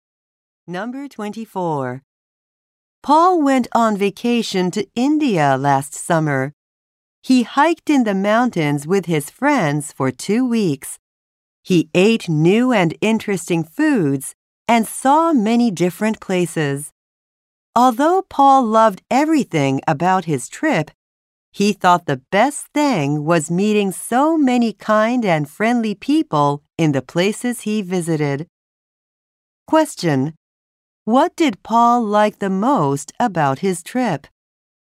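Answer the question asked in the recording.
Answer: Meeting many kind and friendly people.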